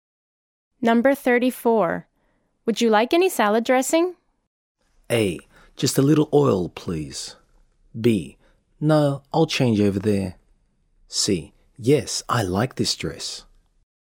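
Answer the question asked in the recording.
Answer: A: Just a little oil, please.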